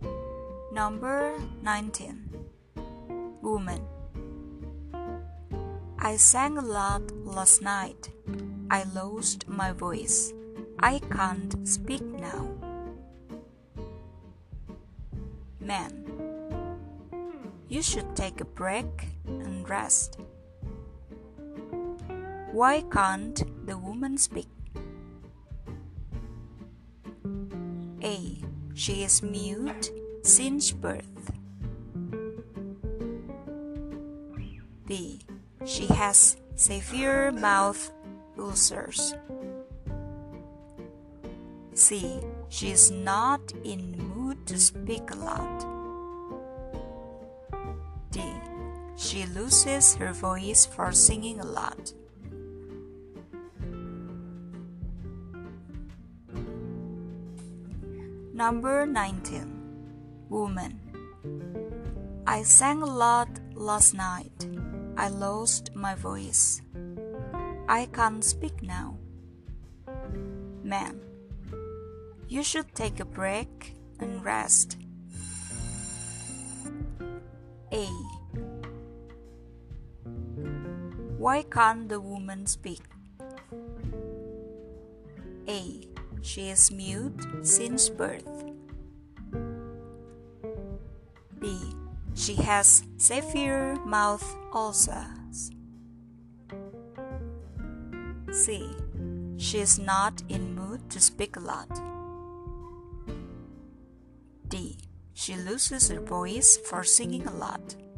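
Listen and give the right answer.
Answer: D: She loses her voice for singing a lot.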